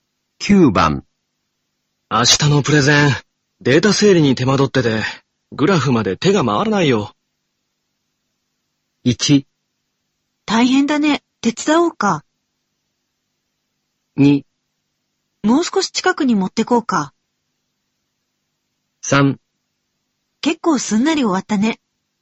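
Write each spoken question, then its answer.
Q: 明日のプレゼン。データ整理に手間取ってて、グラフまで手が回らないよ。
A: 1: 大変だね、手伝おうか。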